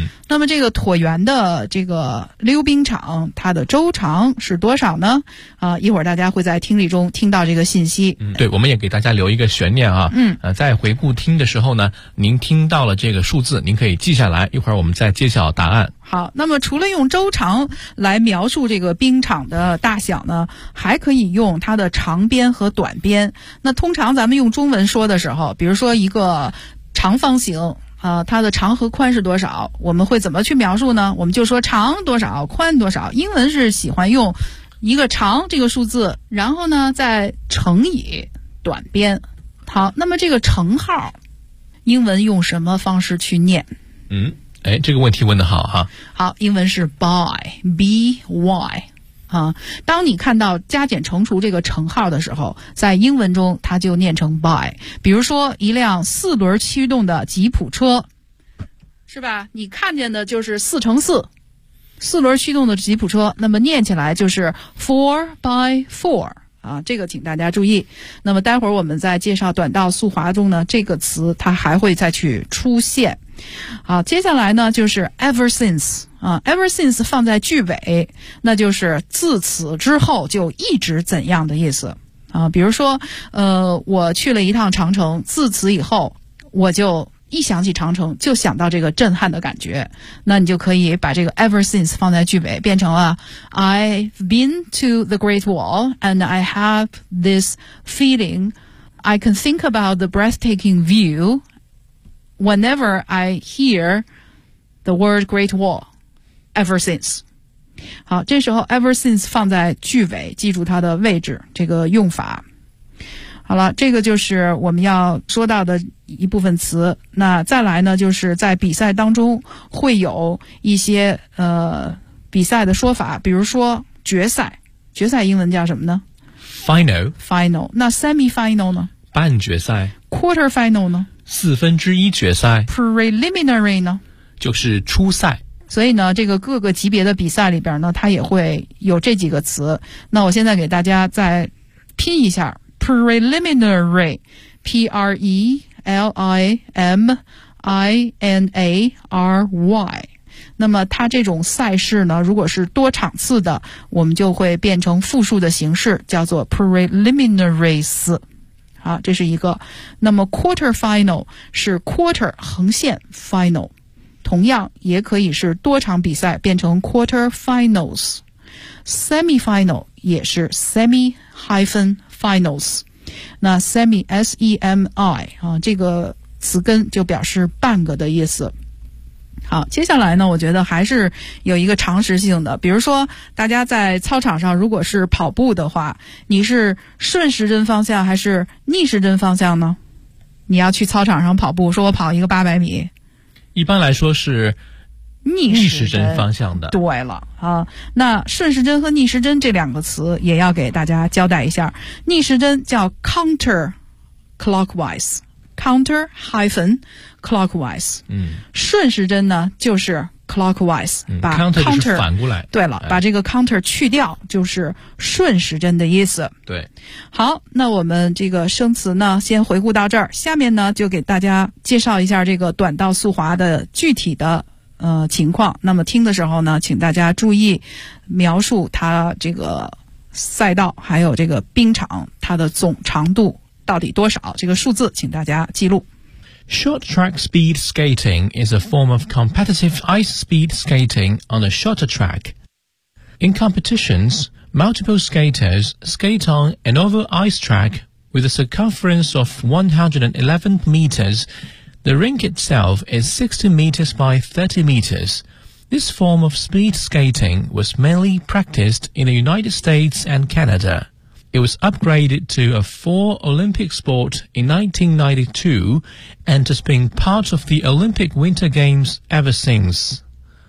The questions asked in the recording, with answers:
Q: 那么这个椭圆的这个溜冰场它的周长是多少呢?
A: 它是111米。